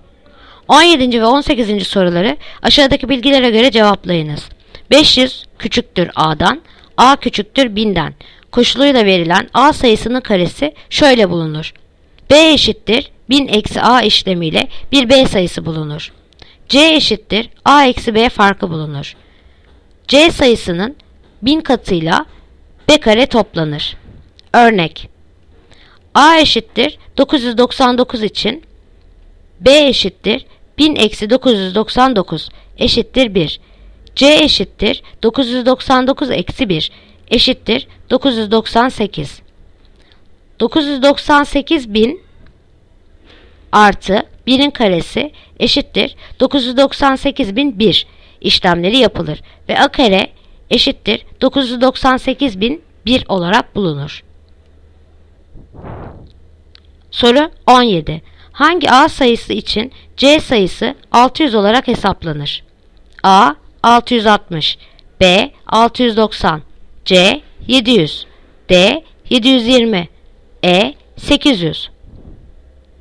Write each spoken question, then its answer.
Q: Hangi A sayısı için C sayısı 600 olarak hesaplanır?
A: Yanıt Edirne 800.